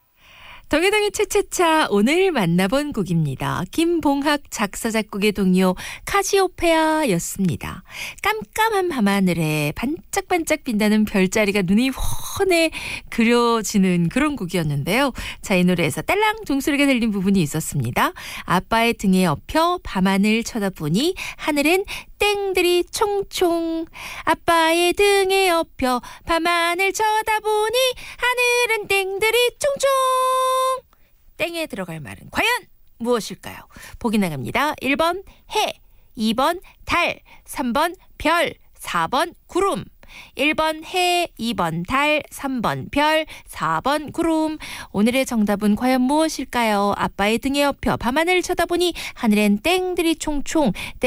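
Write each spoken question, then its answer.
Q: 땡에 들어갈 말은 과연 무엇일까요?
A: 3번: 별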